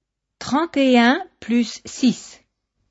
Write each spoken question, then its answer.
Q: 31 plus 6.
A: Ça fait 37.